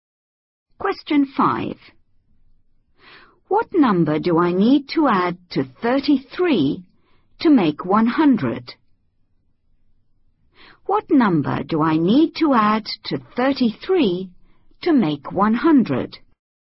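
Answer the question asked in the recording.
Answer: 67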